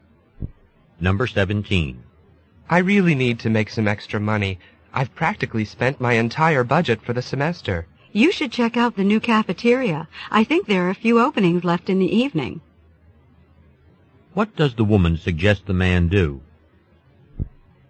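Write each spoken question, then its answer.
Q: What does the woman suggest the man do?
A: Apply for a job at the new cafeteria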